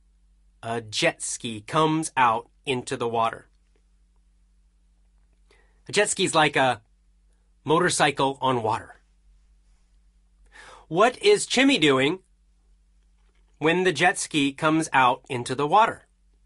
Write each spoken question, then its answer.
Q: What is Chimmy doing when the jet ski comes out into the water?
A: Chimmy is kite surfing.